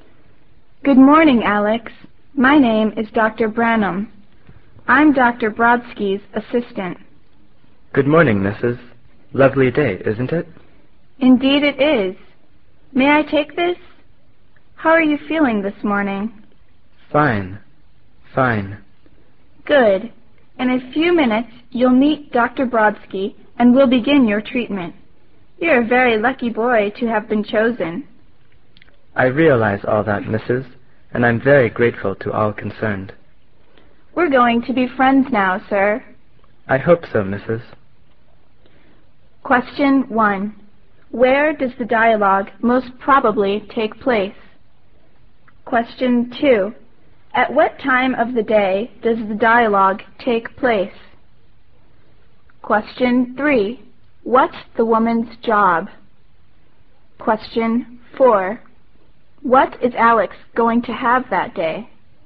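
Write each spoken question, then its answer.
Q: At what time of the day does the dialogue take place?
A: In the morning

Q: What's the woman's job?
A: Dr. Brodsky's assistant

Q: What is Alex going to have that day?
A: His treatment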